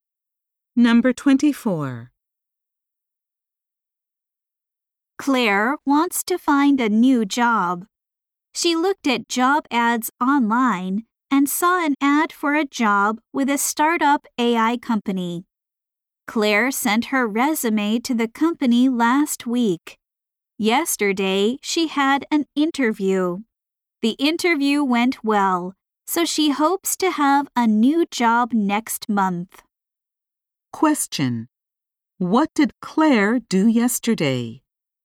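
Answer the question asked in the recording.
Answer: She had a job interview.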